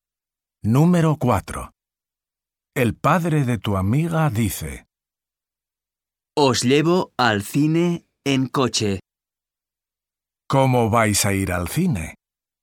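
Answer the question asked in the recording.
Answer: en coche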